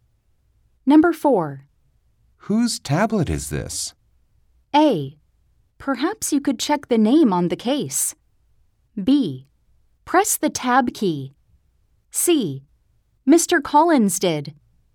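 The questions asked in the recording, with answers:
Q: Whose tablet is this?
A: A: Perhaps you could check the name on the case.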